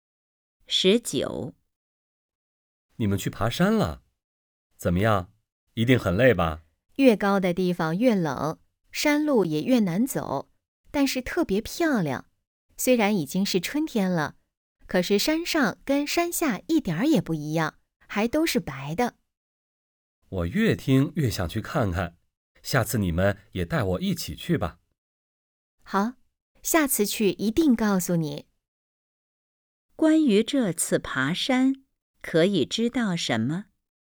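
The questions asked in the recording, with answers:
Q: 关于这次爬山,可以知道什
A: 山上很冷,还都是白的,特别漂亮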